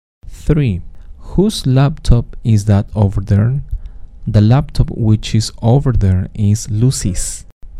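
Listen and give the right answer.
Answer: Lucy's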